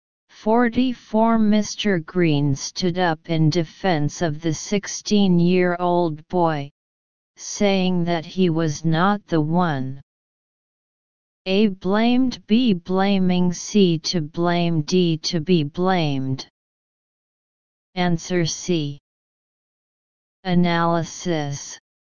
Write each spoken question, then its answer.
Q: Mr. Green stood up in defense of the 16-year-old boy, saying that he was not the one.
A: Answer C.